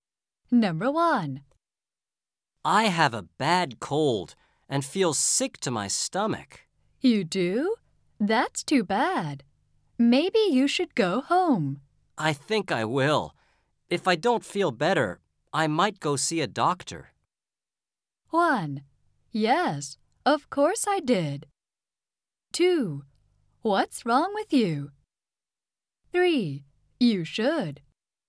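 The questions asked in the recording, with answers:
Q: I think I will. If I don't feel better, I might go see a doctor.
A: 3: You should.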